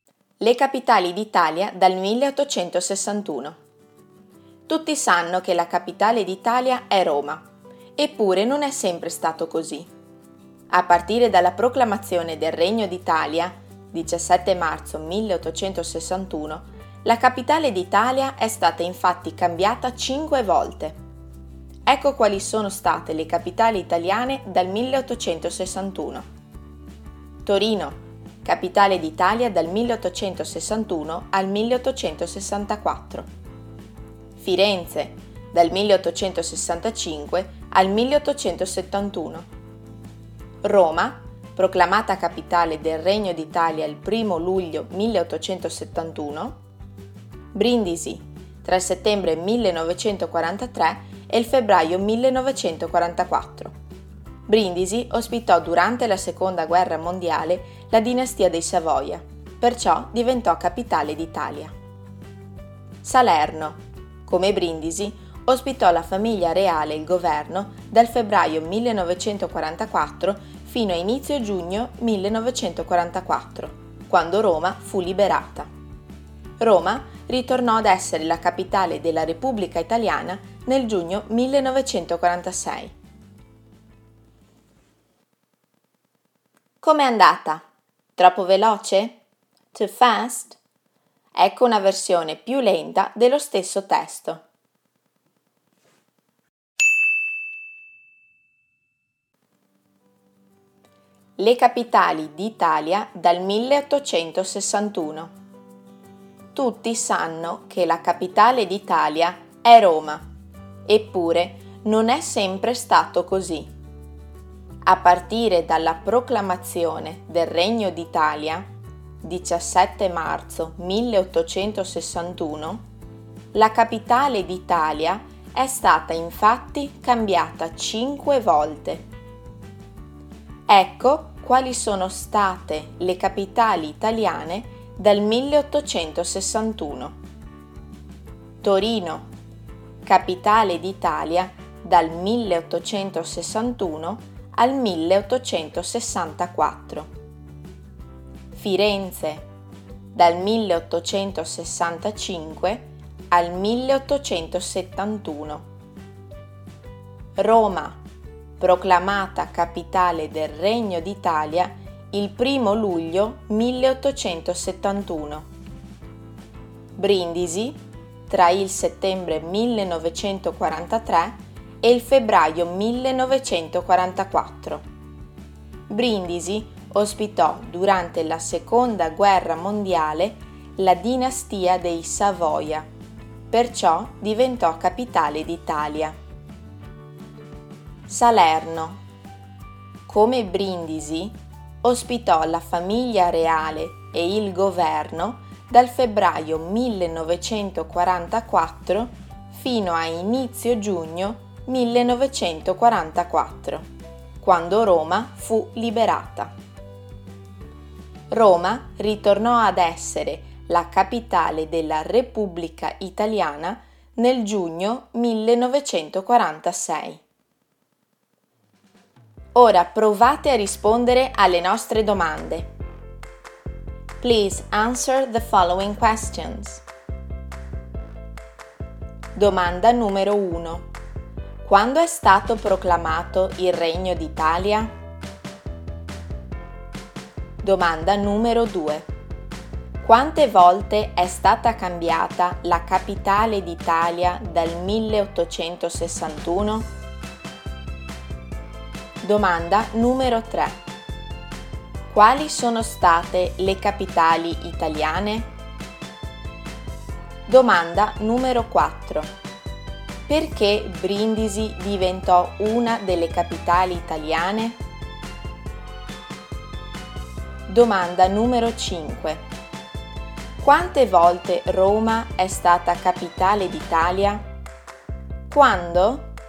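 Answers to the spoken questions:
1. Il 17 marzo 1861
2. 5 volte
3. Torino, Firenze, Roma, Brindisi e Salerno
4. Perché durante la Seconda Guerra Mondiale ospitò la dinastia dei Savoia
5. Due volte: dal 1° luglio 1871 e di nuovo dal giugno 1946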